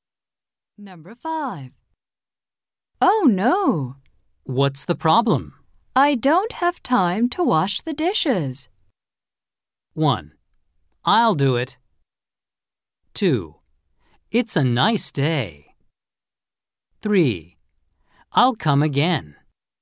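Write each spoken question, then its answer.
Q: I don't have time to wash the dishes.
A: 1: I'll do it.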